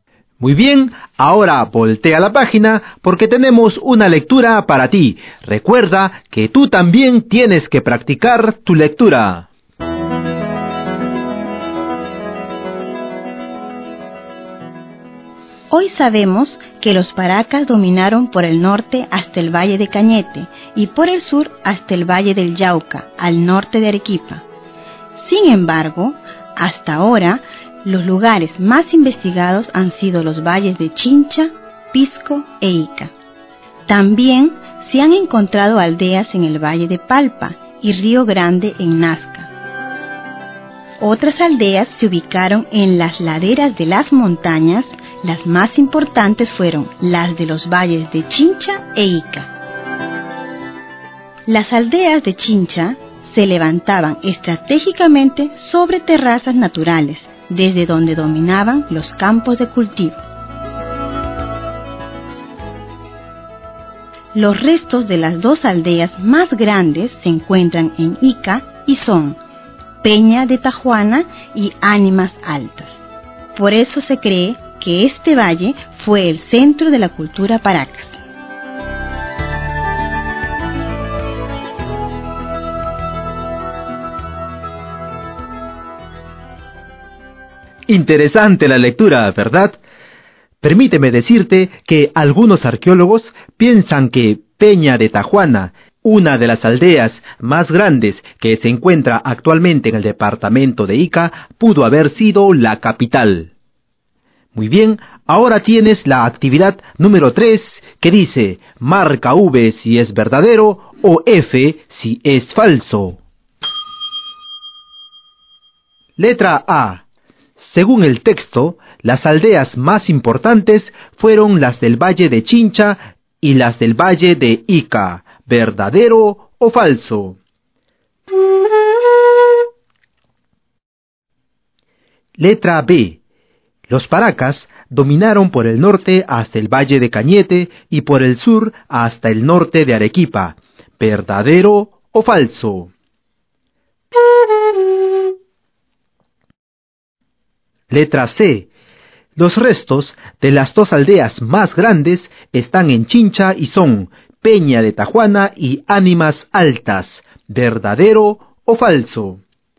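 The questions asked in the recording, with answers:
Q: Según el texto, las aldeas más importantes fueron las del Valle de Chincha y las del Valle de Ica. ¿Verdadero o falso?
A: Verdadero

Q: Los paracas dominaron por el norte hasta el Valle de Cañete y por el sur hasta el norte de Arequipa. ¿Verdadero o falso?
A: Verdadero

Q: Los restos de las dos aldeas más grandes están en Chincha y son Peña de Tajuana y Ánimas Altas. ¿Verdadero o falso?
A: Falso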